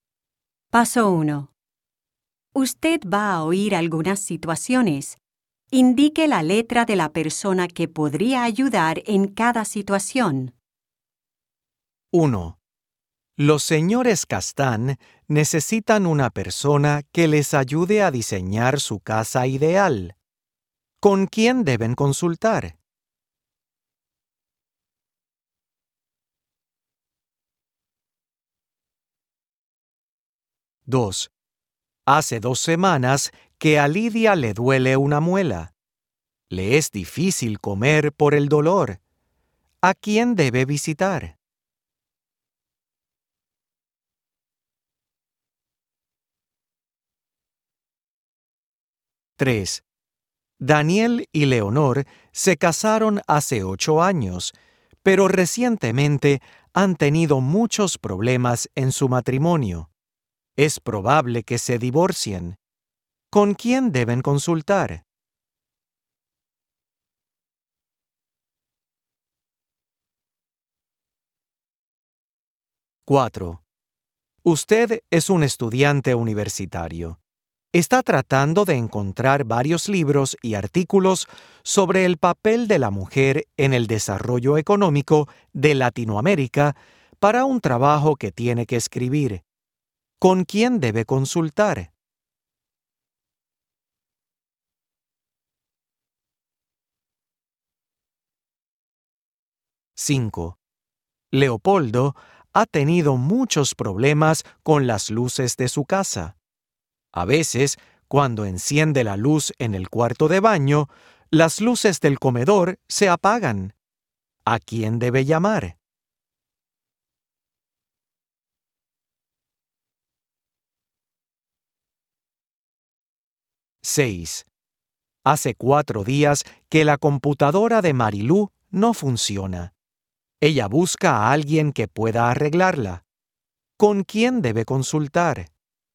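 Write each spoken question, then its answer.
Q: ¿Con quién deben consultar?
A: un arquitecto

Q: ¿A quién debe visitar?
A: un dentista

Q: ¿Con quién deben consultar?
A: un consejero matrimonial

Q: ¿Con quién debe consultar?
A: un bibliotecario

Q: ¿A quién debe llamar?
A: un electricista

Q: ¿Con quién debe consultar?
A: un técnico de computadoras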